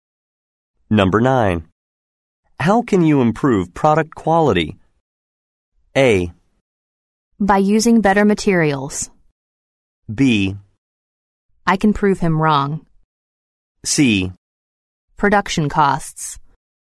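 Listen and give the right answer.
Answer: A: By using better materials.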